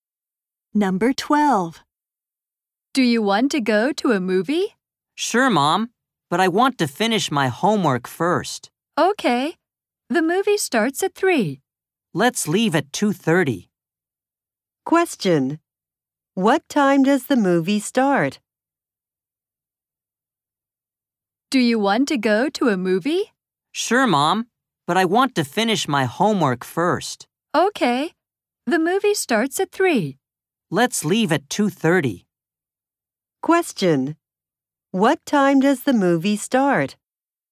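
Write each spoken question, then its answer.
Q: What time does the movie start?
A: At 3.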